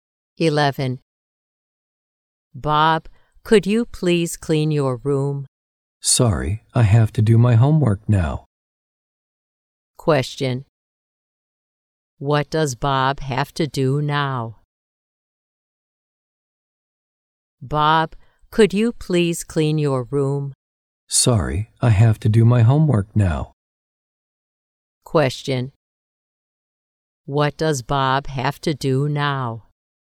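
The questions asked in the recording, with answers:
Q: What does Bob have to do now?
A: Do his homework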